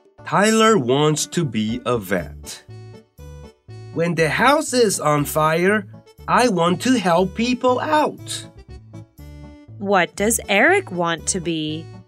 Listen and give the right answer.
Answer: He wants to be a fireman.